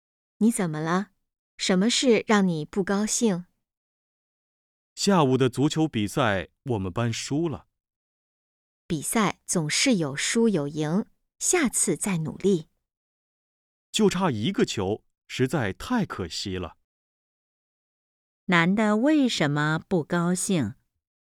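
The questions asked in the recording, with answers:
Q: 男的为什么不高兴?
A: 他们班足球比赛输了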